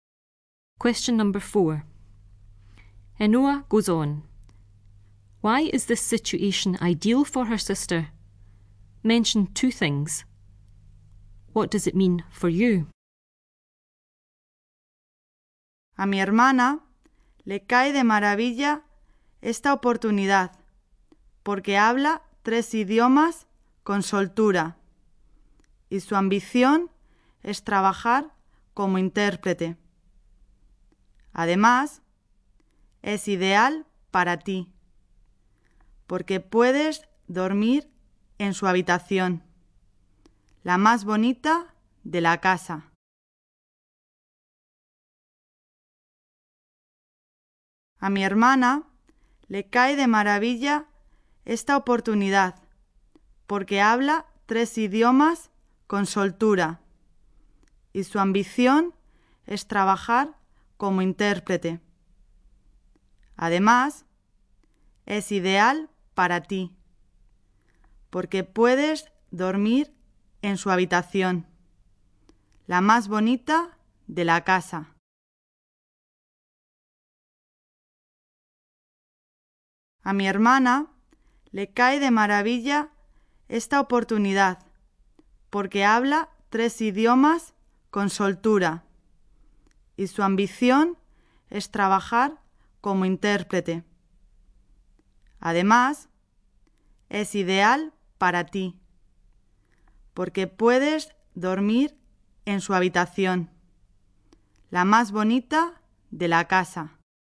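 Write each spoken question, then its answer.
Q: Why is this situation ideal for her sister?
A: She speaks three languages fluently and wants to be an interpreter

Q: What does it mean for you?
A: You can sleep in her room, the nicest in the house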